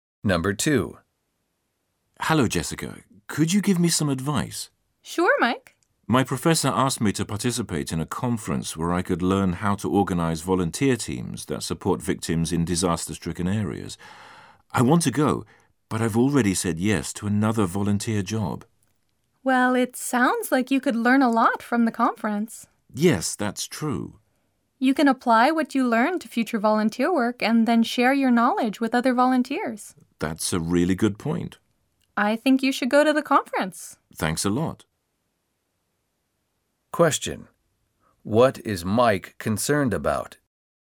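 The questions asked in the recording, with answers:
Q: What is Mike concerned about?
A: He has already agreed to do another volunteer job, so he isn't sure he can go to the conference.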